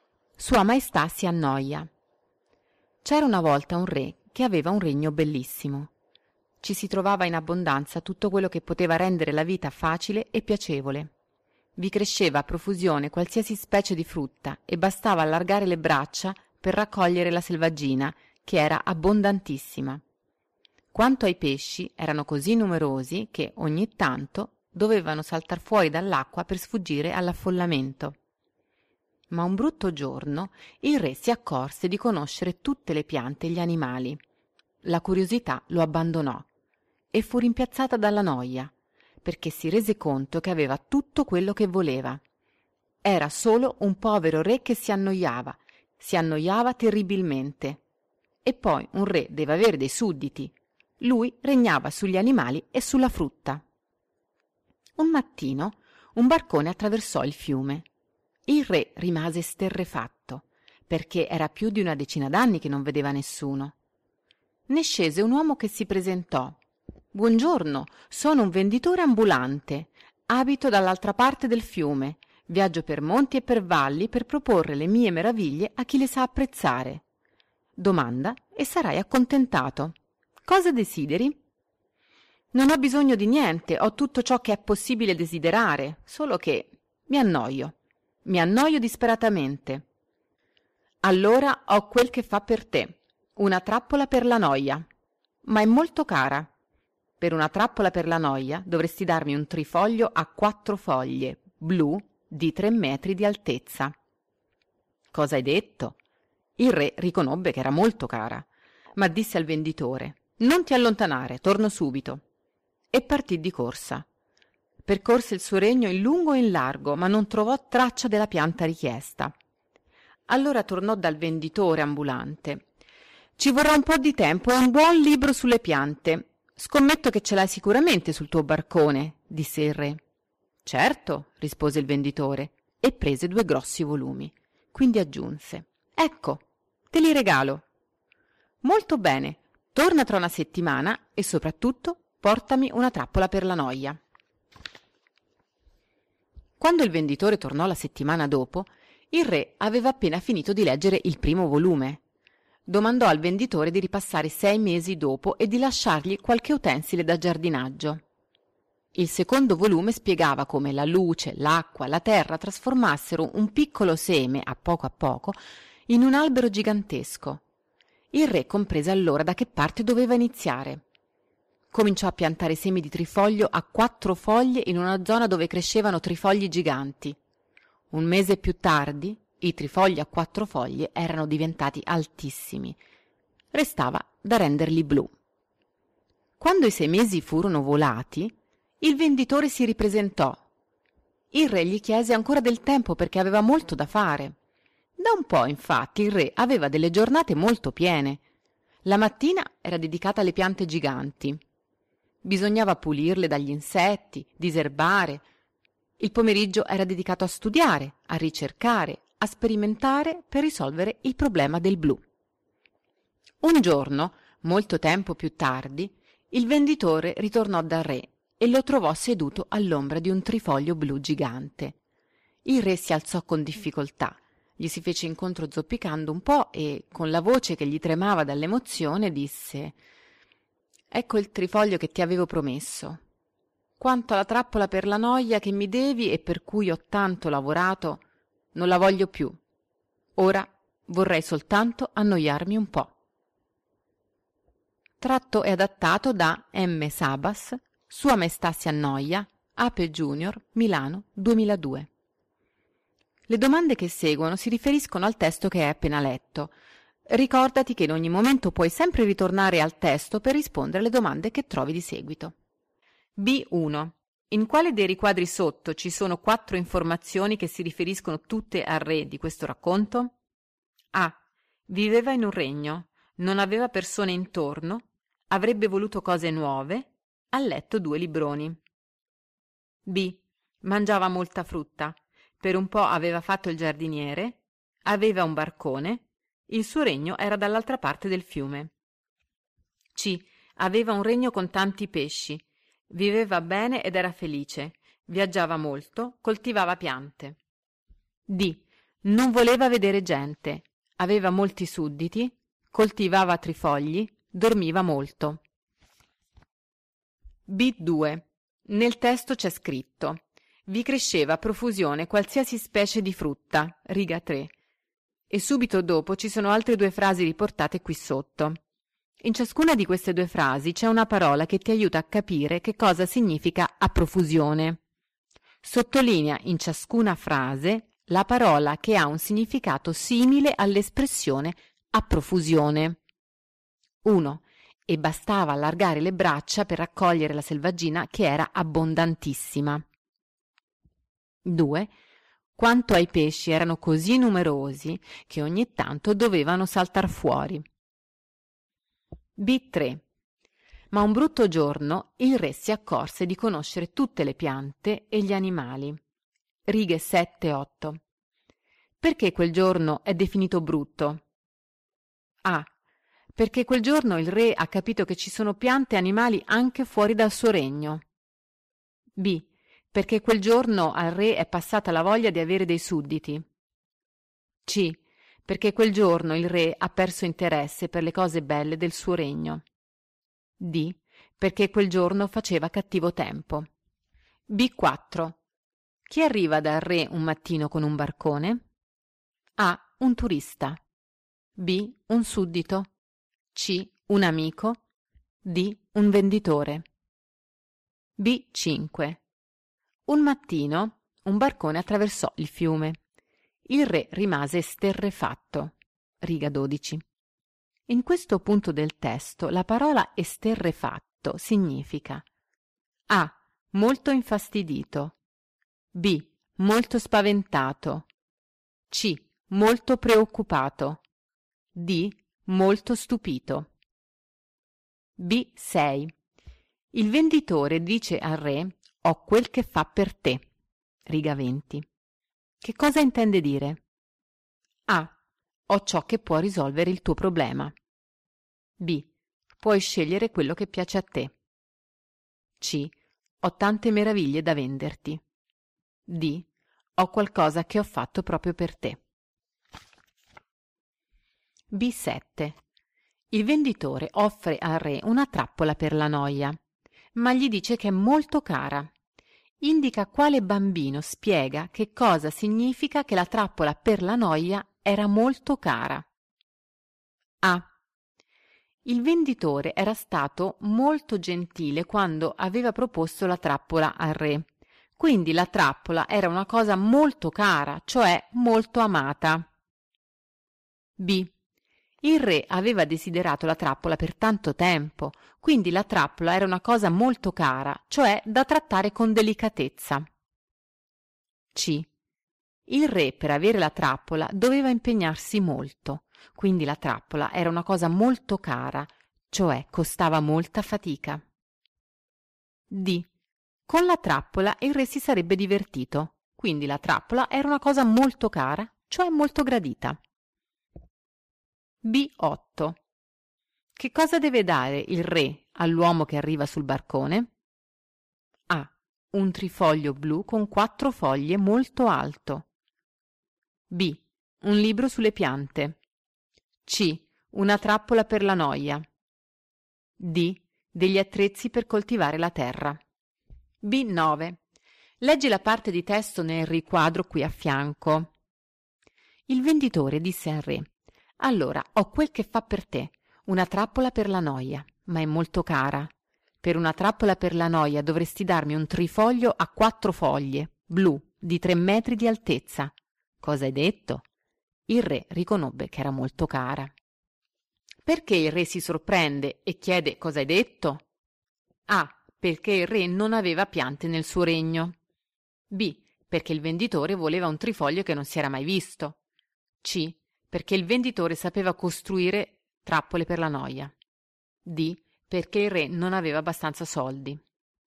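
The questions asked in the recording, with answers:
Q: In quale dei riquadri sotto ci sono 4 informazioni che si riferiscono tutte al re di questo racconto?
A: A: Viveva in un regno, non aveva persone intorno, avrebbe voluto cose nuove, ha letto 2 libroni.

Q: Perché quel giorno è definito brutto?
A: C: perché quel giorno il re ha perso interesse per le cose belle del suo regno.

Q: Chi arriva dal re un mattino con un barcone?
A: D: Un venditore.

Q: In questo punto del testo la parola esterrefatto significa A.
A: D: Molto stupito.

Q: Che cosa intende dire?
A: A: Ho ciò che può risolvere il tuo problema.

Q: Indica quale bambino spiega che cosa significa che la trappola per la noia era molto cara.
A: C: Il re per avere la trappola doveva impegnarsi molto, cioè costava molta fatica.

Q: Che cosa deve dare il re all'uomo che arriva sul barcone?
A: A: Un trifoglio blu con quattro foglie molto alto.

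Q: Perché il re si sorprende e chiede cosa hai detto?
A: B: Perché il venditore voleva un trifoglio che non si era mai visto.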